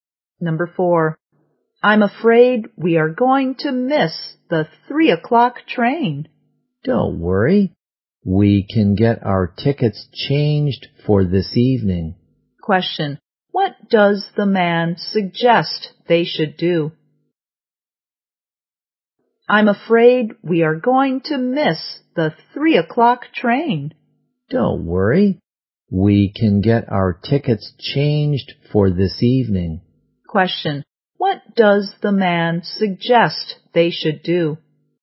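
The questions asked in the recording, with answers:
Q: What does the man suggest they should do?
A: Change their tickets for this evening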